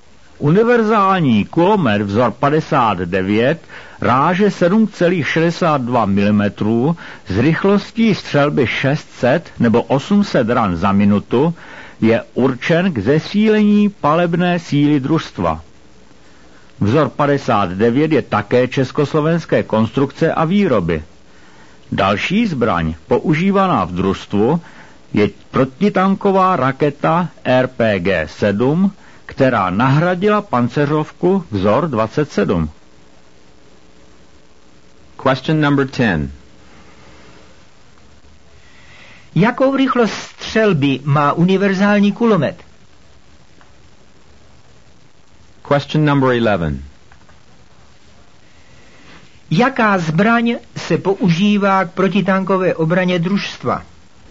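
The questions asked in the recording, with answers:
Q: Jakou rychlost střelby má univerzální kulomet?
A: 600 nebo 800 ran za minutu

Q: Jaká zbraň se používá k protitankové obraně družstva?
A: Protitanková raketa RPG-7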